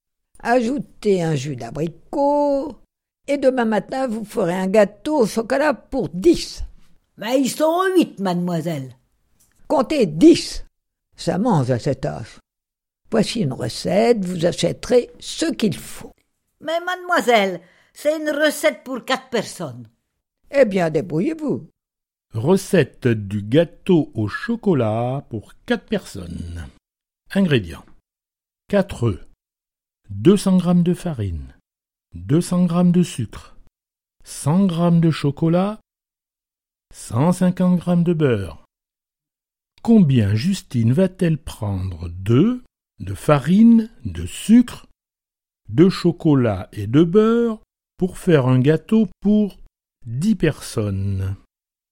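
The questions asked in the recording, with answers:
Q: Combien Justine va-t-elle prendre d'œufs, de farine, de sucre, de chocolat et de beurre pour faire un gâteau pour 10 personnes.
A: 10 œufs, 500 g de farine, 500 g de sucre, 250 g de chocolat, 375 g de beurre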